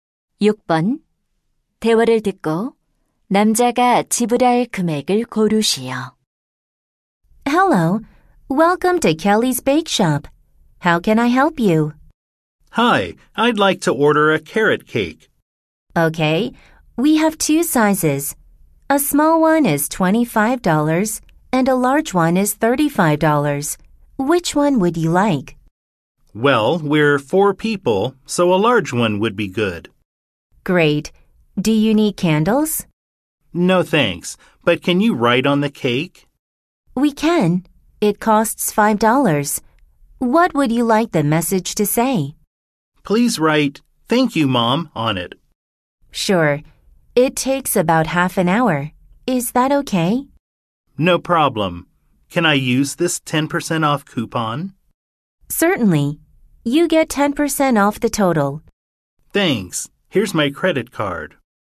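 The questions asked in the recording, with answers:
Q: 대화를 듣고 남자가 지불할 금액을 고르시오.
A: $36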